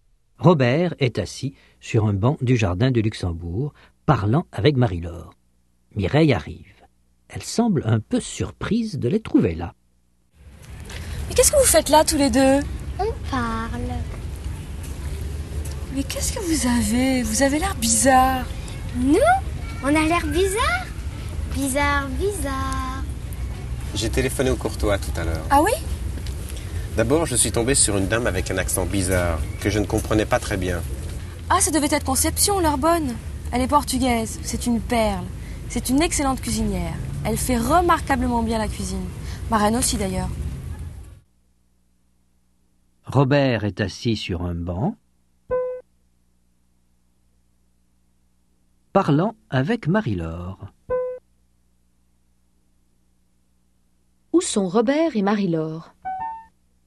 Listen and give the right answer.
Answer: Sur un banc du jardin du Luxembourg.